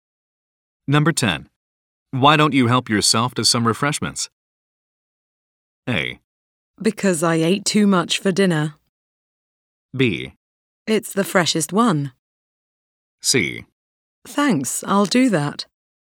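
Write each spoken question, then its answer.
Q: Why don't you help yourself to some refreshments?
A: C: Thanks, I'll do that.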